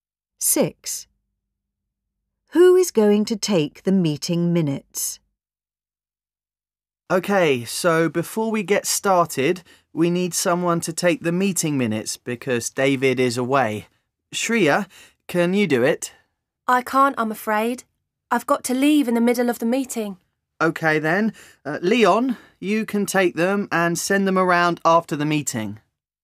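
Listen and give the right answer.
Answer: Leon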